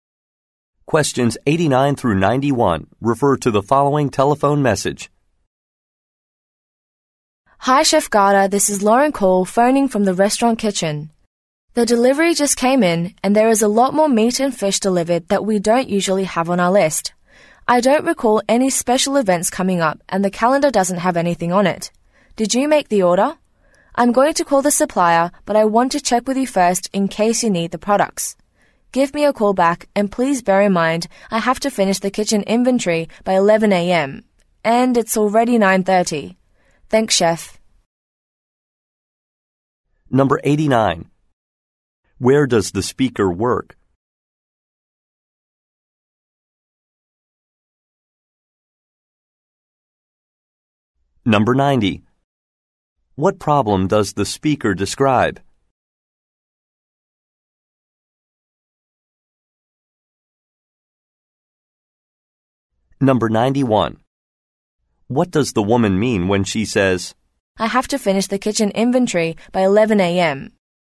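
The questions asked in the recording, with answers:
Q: Where does the speaker work?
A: At a restaurant kitchen

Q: What problem does the speaker describe?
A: Much more meat and fish was delivered than usual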